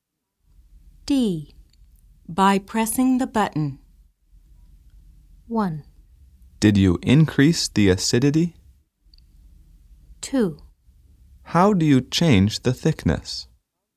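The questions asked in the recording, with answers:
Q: By pressing the button.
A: 2: How do you change the thickness?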